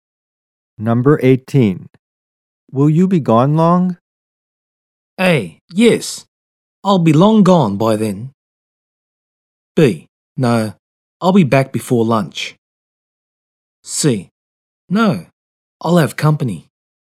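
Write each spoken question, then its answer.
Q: Will you be gone long?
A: B: No, I'll be back before lunch.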